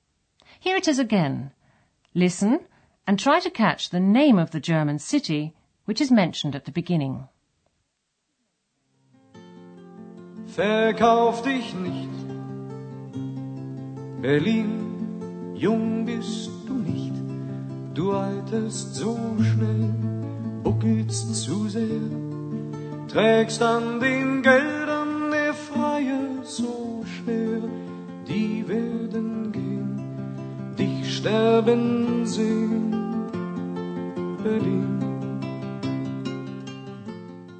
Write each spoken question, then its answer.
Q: Listen and try to catch the name of the German city which is mentioned at the beginning.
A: Berlin. Berlin.